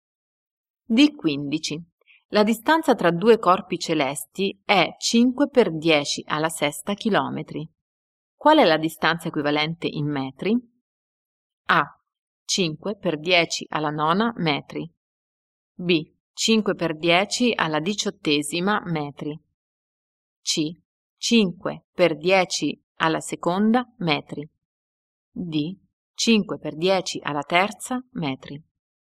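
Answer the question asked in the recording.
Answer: A: 5 per 10 alla nona metri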